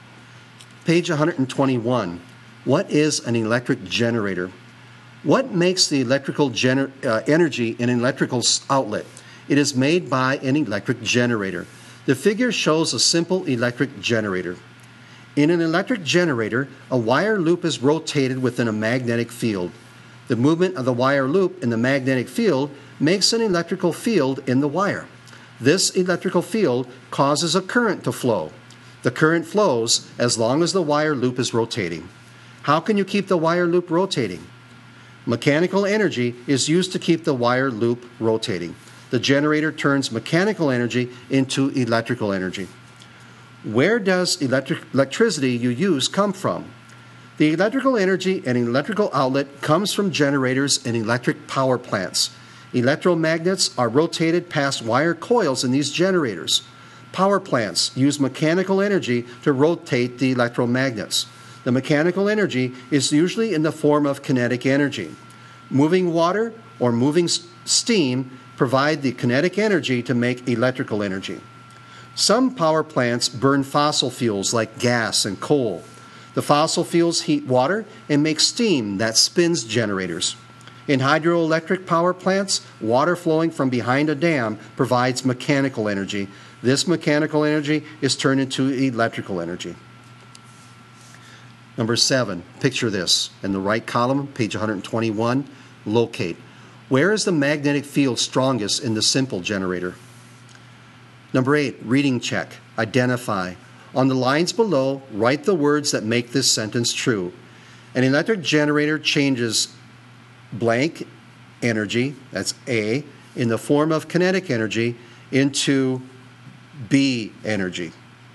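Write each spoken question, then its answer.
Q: An electric generator changes blank energy, that's A, in the form of kinetic energy into B energy.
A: A: mechanical; B: electrical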